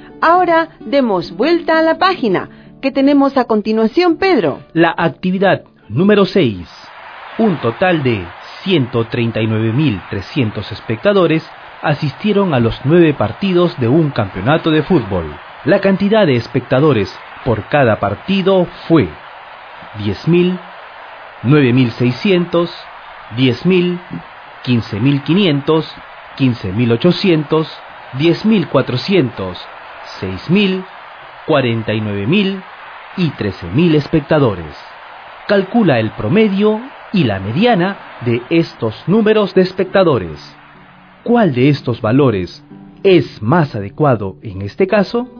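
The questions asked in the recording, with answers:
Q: Calcula el promedio y la mediana de estos números de espectadores.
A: Promedio ≈ 15.478; mediana = 10.400

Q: ¿Cuál de estos valores es más adecuado en este caso?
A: La mediana (el 49.000 es un valor atípico)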